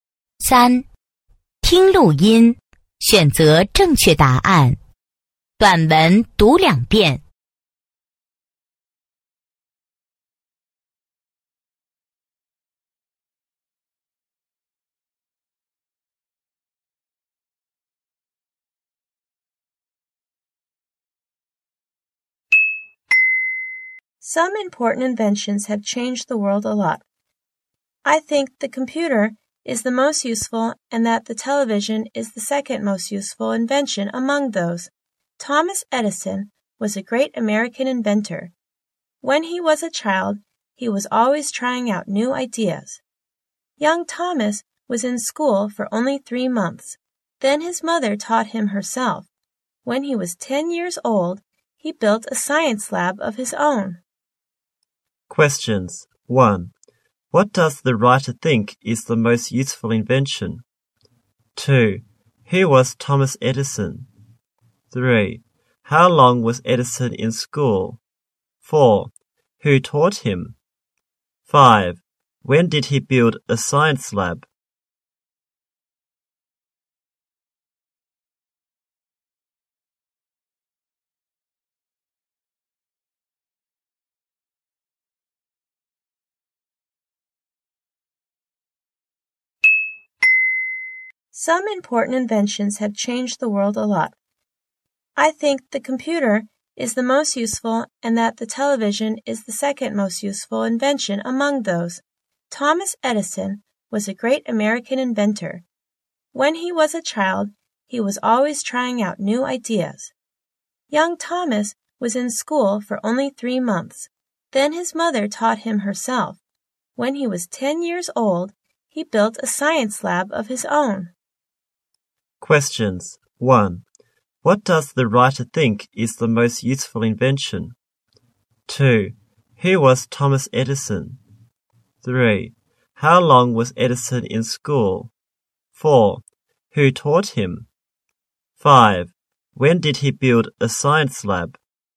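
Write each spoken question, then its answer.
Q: What does the writer think is the most useful invention?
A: The computer.

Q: Who was Thomas Edison?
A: A great American inventor.

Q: How long was Edison in school?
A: Only 3 months.

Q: Who taught him?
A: His mother.

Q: When did he build a science lab?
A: When he was 10 years old.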